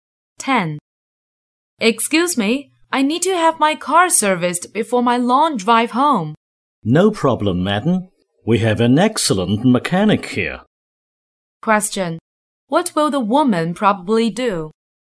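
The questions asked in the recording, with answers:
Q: What will the woman probably do?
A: Have her car serviced there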